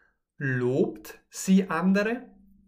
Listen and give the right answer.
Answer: Nein, sie lobt nicht andere.